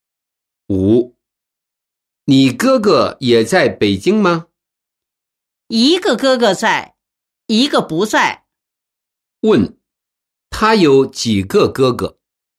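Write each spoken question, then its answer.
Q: 他有几个哥哥?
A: 两个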